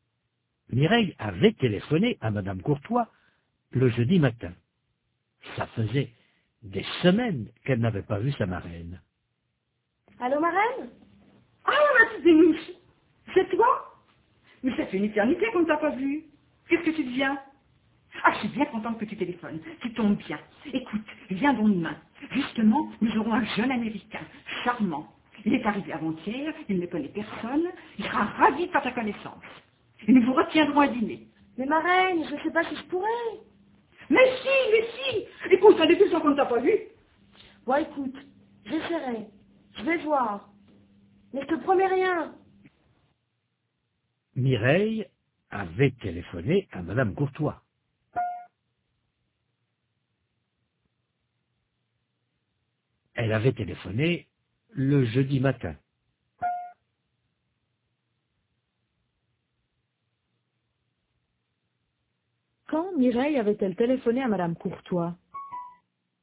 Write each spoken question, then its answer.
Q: Quand Mireille avait-elle téléphoné à Madame Courtois?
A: Le jeudi matin.